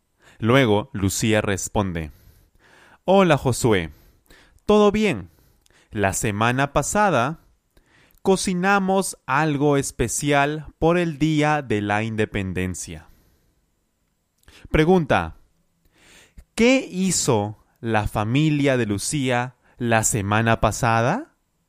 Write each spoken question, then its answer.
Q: ¿qué hizo la familia de Lucía la semana pasada?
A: Ellos cocinaron algo especial.